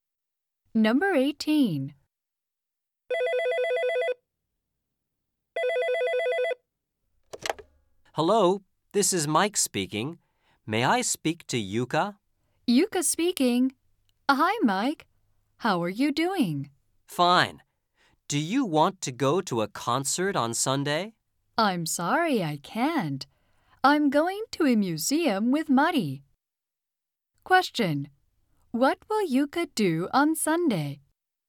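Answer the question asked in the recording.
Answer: Go to a museum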